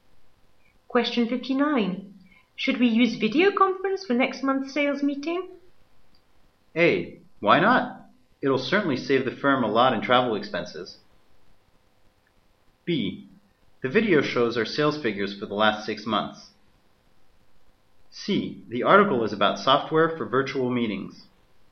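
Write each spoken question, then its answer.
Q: Should we use video conference for next month's sales meeting?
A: A: Why not? It'll certainly save the firm a lot in travel expenses.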